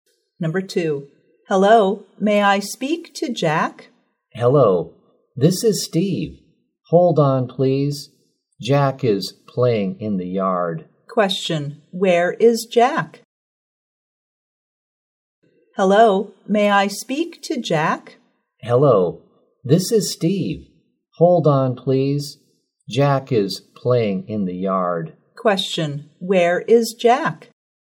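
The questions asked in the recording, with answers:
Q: where is Jack?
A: In the yard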